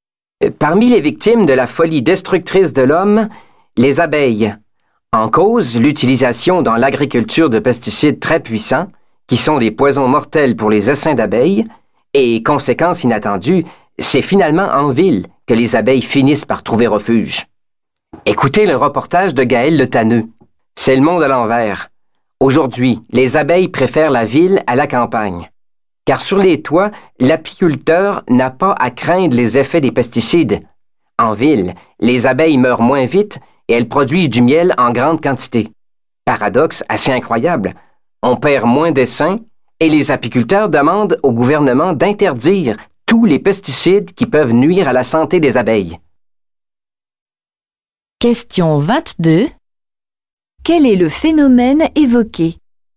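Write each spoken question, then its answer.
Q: Quel est le phénomène évoqué?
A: Les abeilles trouvent refuge en ville, où elles meurent moins et produisent plus de miel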